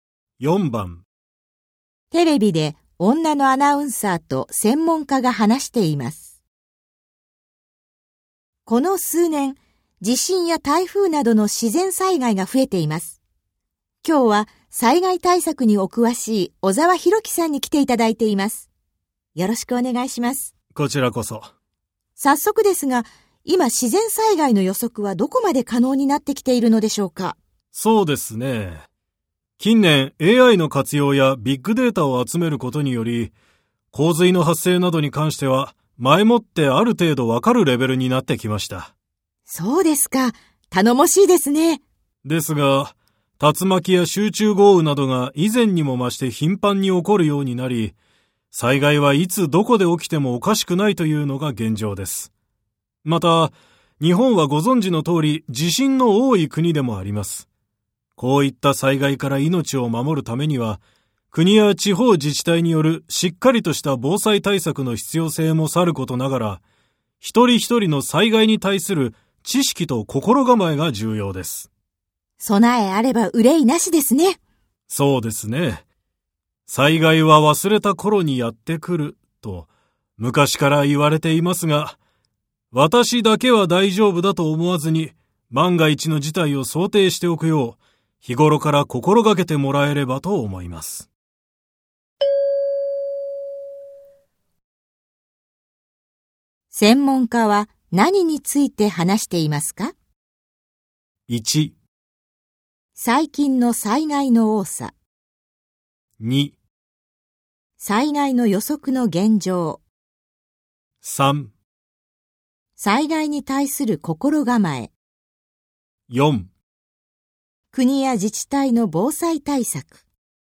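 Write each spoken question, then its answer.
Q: 専門家は何について話していますか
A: 3: 災害に対する心構え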